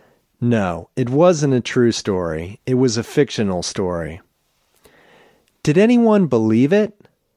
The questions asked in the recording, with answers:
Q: Did anyone believe it?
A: Yes, many people believed it.